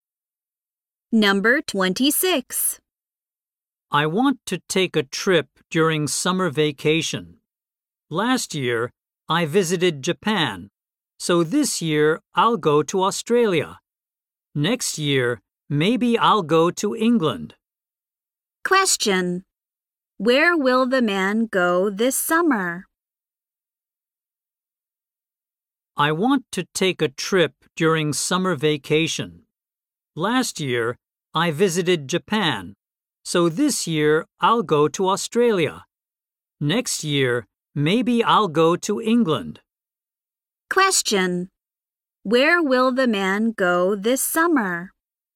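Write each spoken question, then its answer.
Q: Where will the man go this summer?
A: Australia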